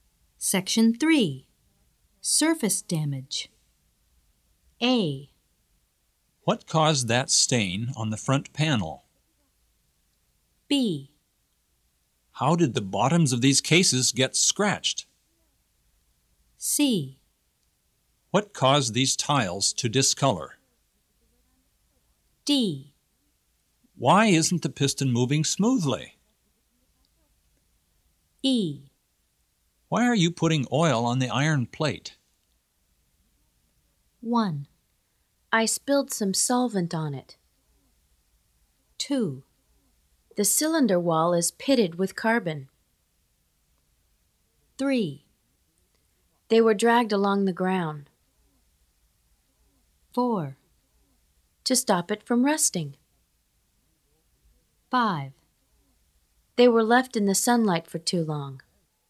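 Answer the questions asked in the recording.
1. 1: I spilled some solvent on it.
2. 3: They were dragged along the ground.
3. 5: They were left in the sunlight for too long.
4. 2: The cylinder wall is pitted with carbon.
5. 4: To stop it from rusting.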